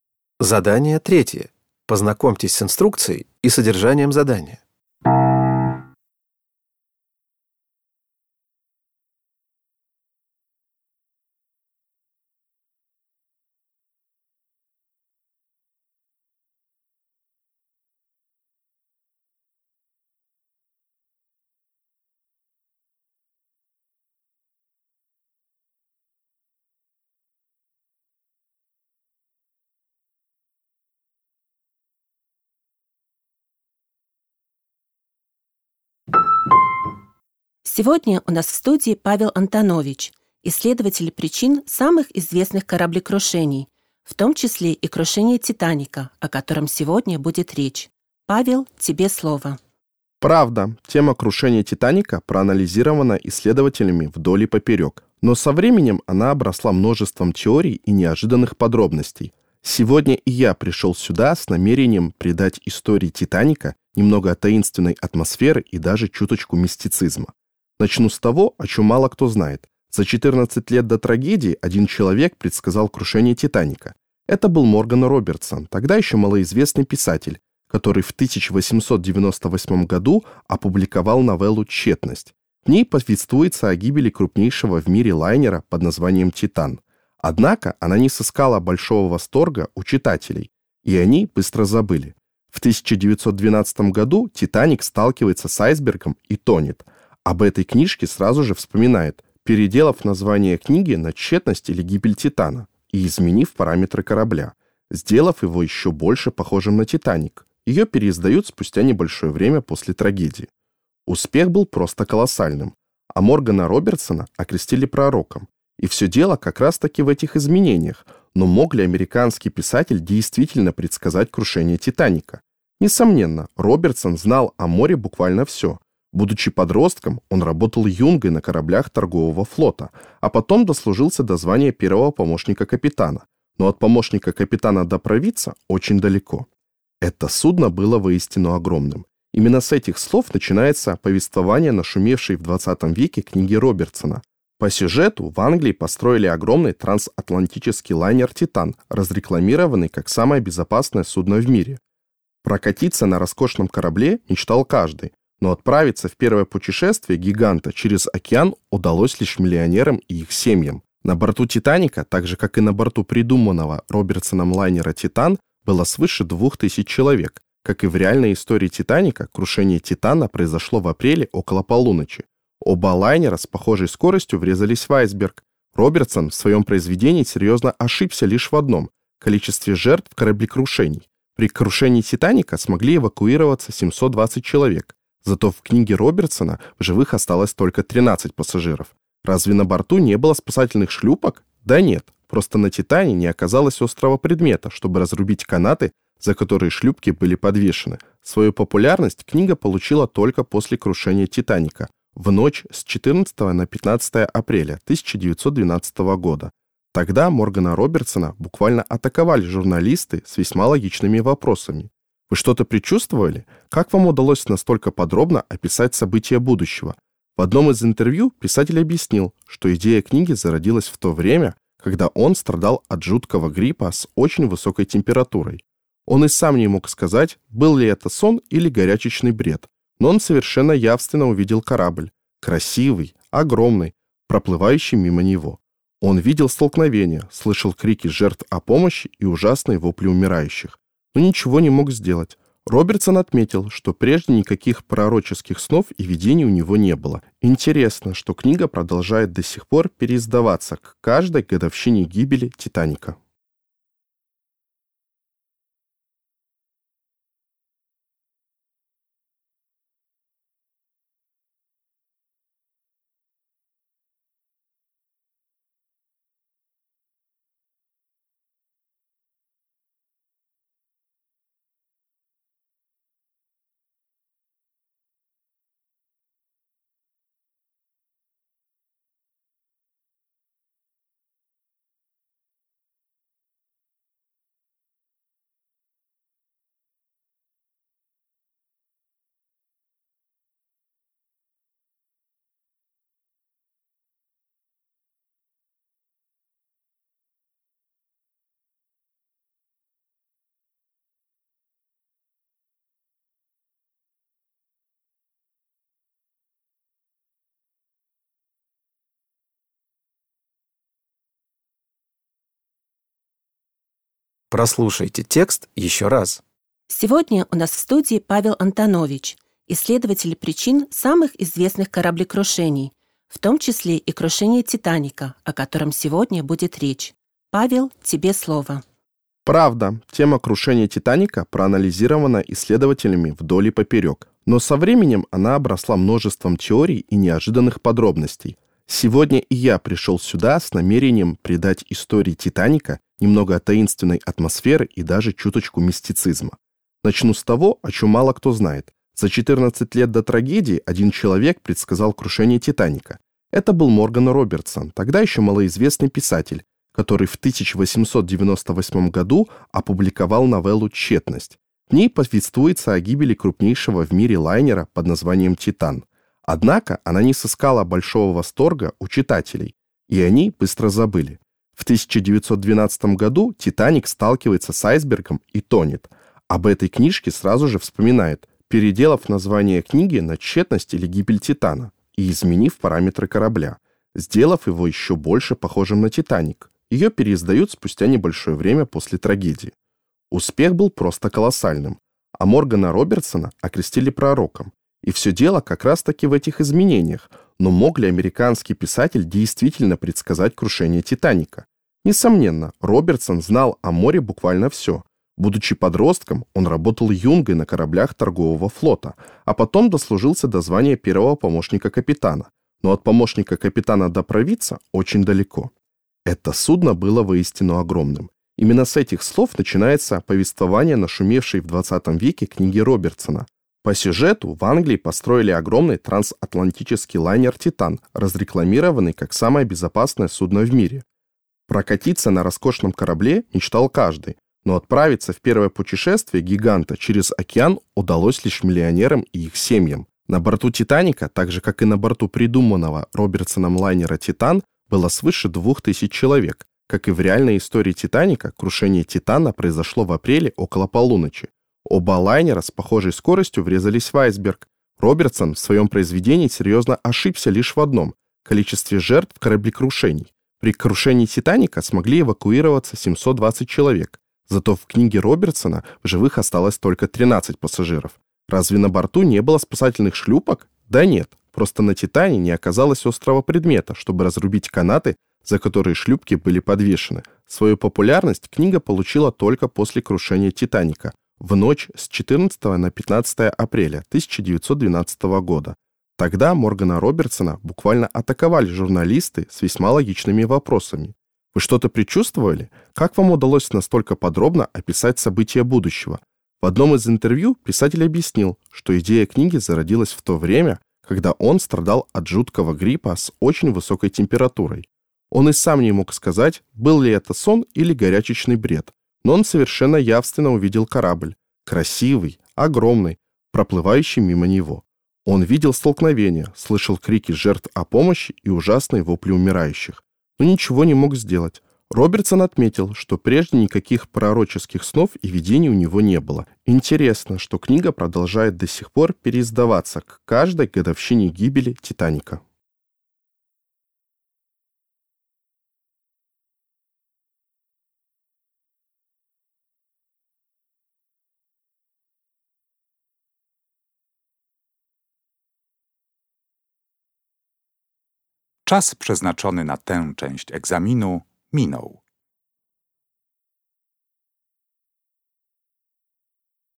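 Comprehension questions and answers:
Прослушайте дважды интервью с исследователем причин известных кораблекрушений. Ответьте коротко на вопросы (3.1.–3.4.) в соответствии с содержанием текста. На вопросы следует ответить по-русски.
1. Что привело к переизданию книги Робертсона в обновлённой версии?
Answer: Крушение «Титаника» в 1912 году

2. Какие две должности упоминаются в интервью в связи с работой Робертсона на корабле?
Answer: Юнга и первый помощник капитана

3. Почему, согласно содержанию книги, пассажиры «Титана» не смогли воспользоваться спасательными шлюпками?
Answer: На корабле не оказалось острого предмета, чтобы разрубить канаты, на которых висели шлюпки

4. При каких обстоятельствах, по словам Робертсона, у него появился замысел книги «Тщетность»?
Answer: Когда он болел тяжёлым гриппом с очень высокой температурой (во сне или в бреду)

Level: Poziom: dwujęzyczny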